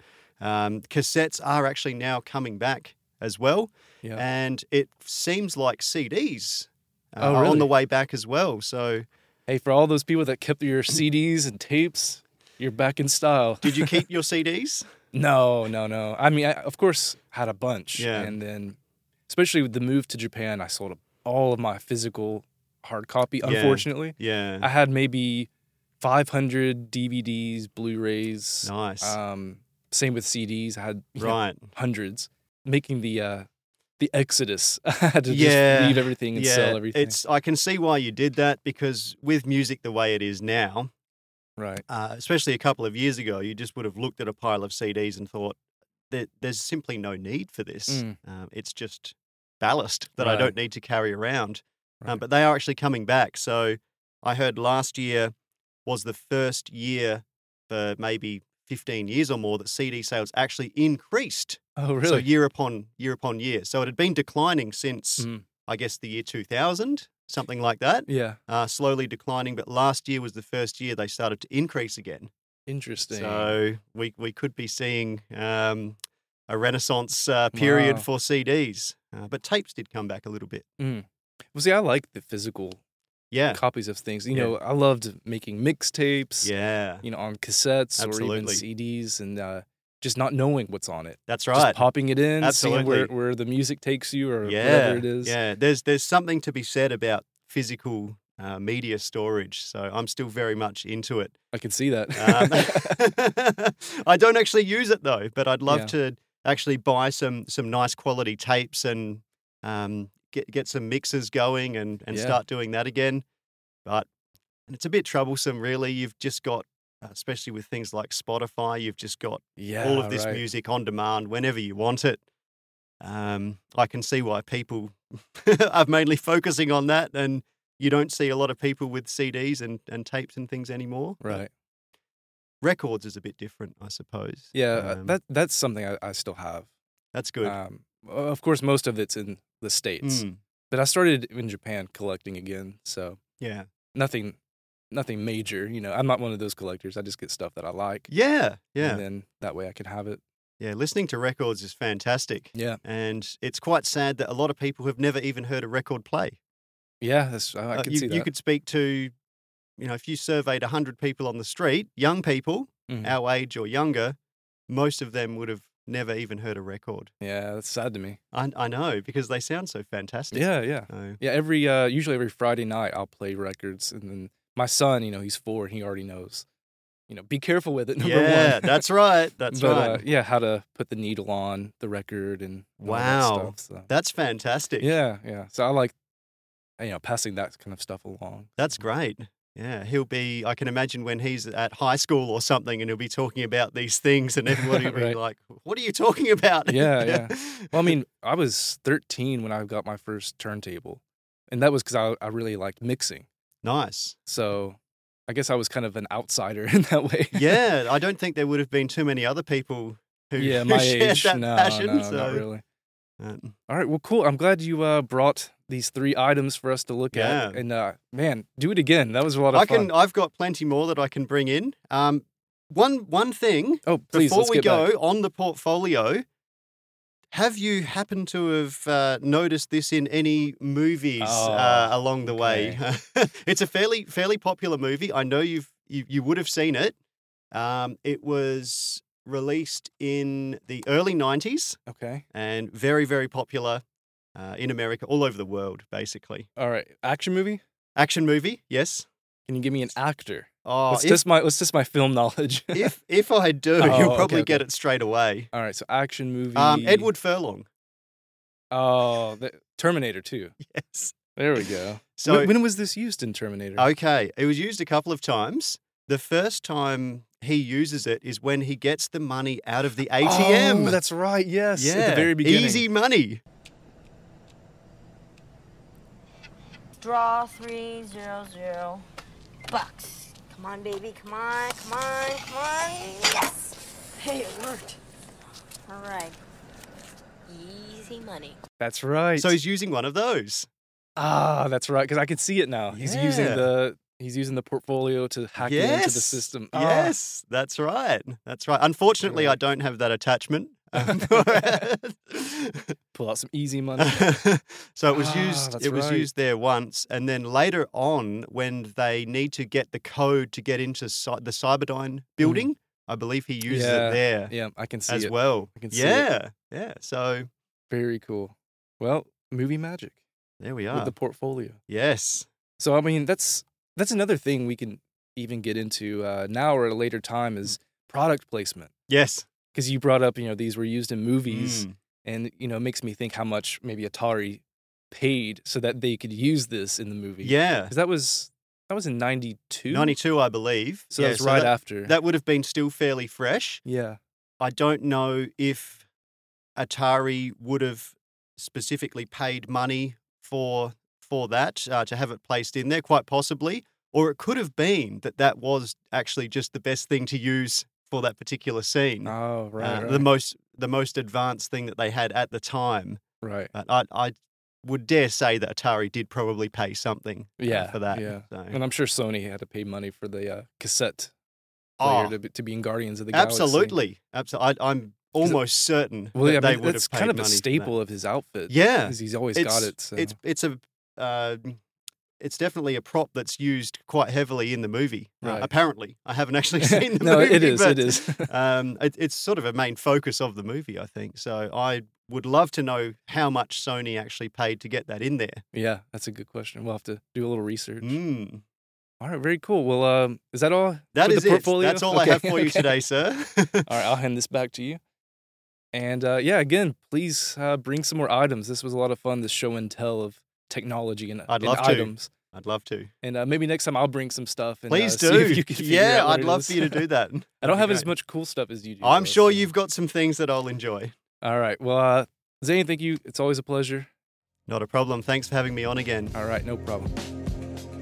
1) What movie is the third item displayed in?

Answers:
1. Terminator 2